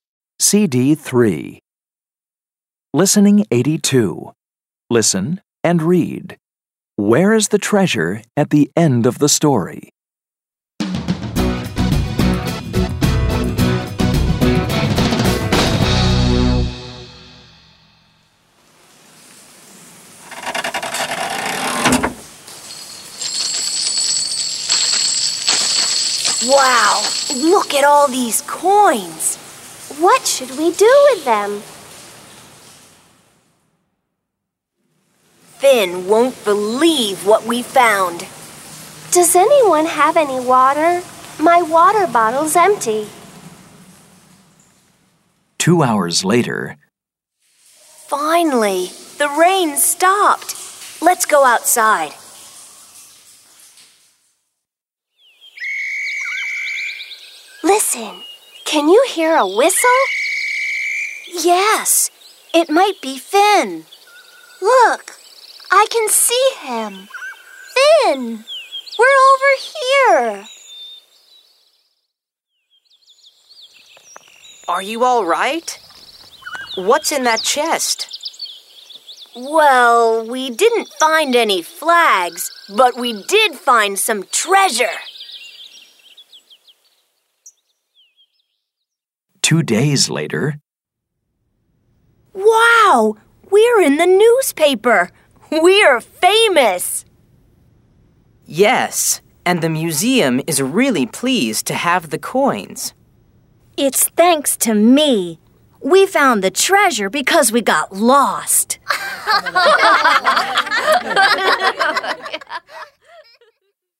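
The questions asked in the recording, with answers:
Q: Where is the treasure at the end of the story?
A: In the museum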